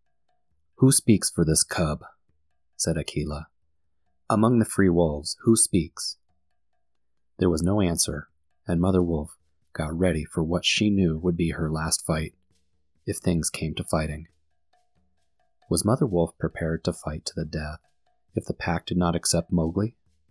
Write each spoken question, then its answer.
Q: Was Mother Wolf prepared to fight to the death if the pack did not accept Mowgli?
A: Yes, Mother Wolf was prepared to fight to the death if her new cub Mowgli was not accepted.